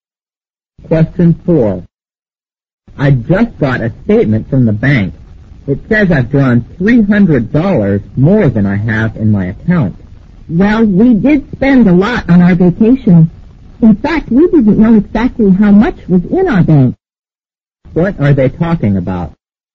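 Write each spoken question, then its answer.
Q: What are they talking about?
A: Their overdrawn bank account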